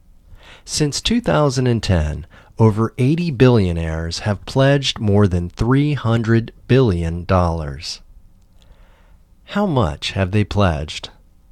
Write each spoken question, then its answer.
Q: How much have they pledged?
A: They have pledged more than $300 billion.